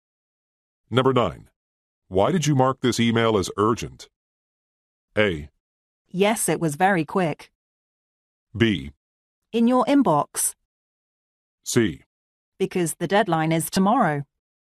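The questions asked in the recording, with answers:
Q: Why did you mark this email as urgent?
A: C: Because the deadline is tomorrow.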